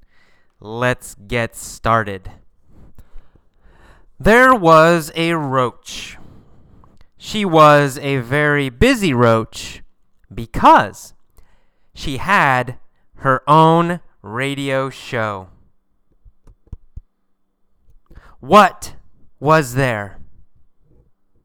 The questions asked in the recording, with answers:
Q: What was there?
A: There was a roach.